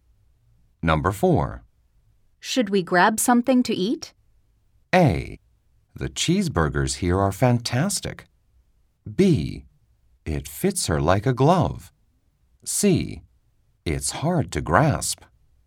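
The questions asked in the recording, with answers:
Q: Should we grab something to eat?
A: A: The cheeseburgers here are fantastic.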